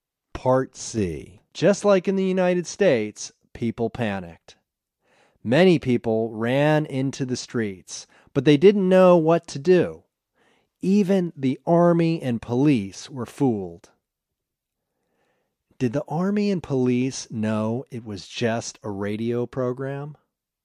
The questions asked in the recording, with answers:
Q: Did the army and police know it was just a radio program?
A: No, the army and police didn't know it was just a radio program.